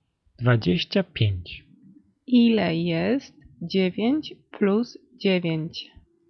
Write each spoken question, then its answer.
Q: Ile jest 9 plus 9.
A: 18.